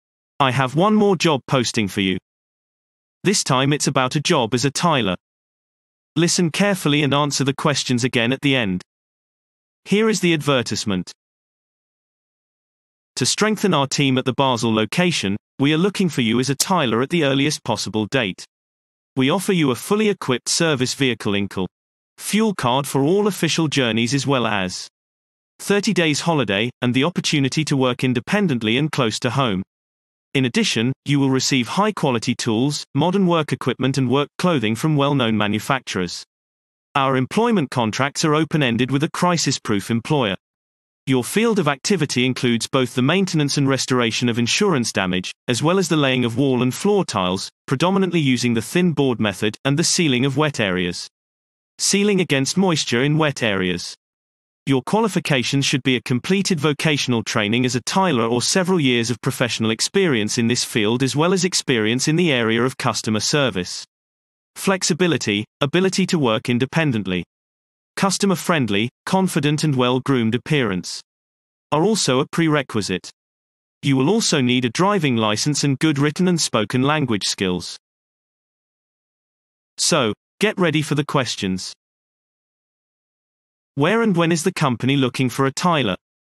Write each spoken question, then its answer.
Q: Where and when is the company looking for a tiler?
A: Response. The company is looking for a tiler at the Basel location with immediate effect.